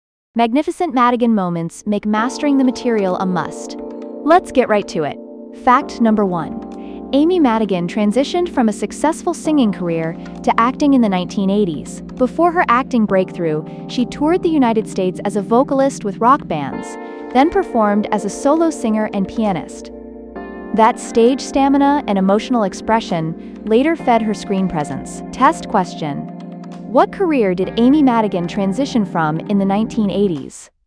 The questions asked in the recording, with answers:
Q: What career did Amy Madigan transition from in the 1980s?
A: Correct answer, singing.